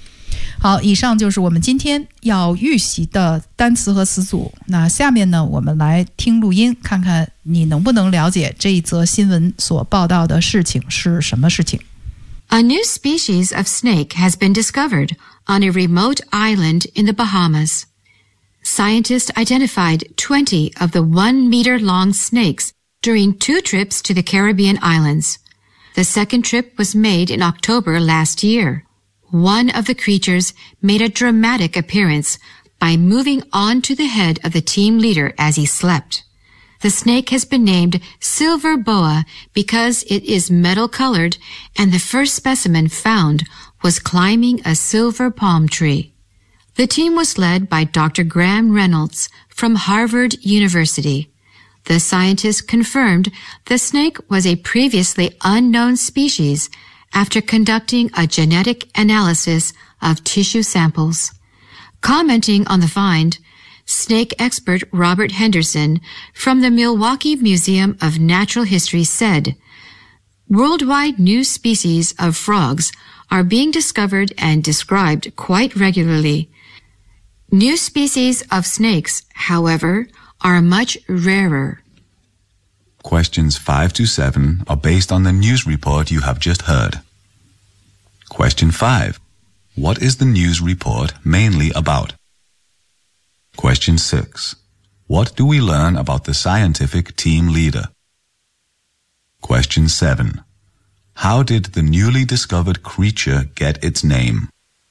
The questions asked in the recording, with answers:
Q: What is the news report mainly about?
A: It is about the discovery of a new species of the snake in the Bahamas.

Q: What do we learn about the scientific team leader?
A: the team leader is a professor from the Harvard University.

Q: How did the newly discovered creature get its name?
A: Because the color of the snake is metallic, 是金属的。